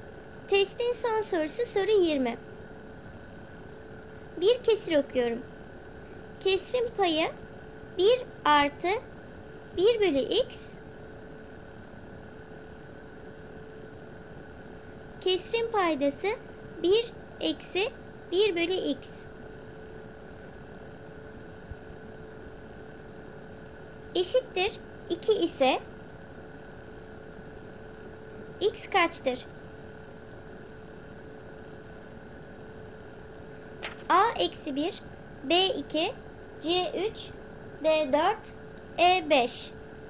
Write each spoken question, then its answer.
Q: x kaçtır?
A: Doğru cevap C 3.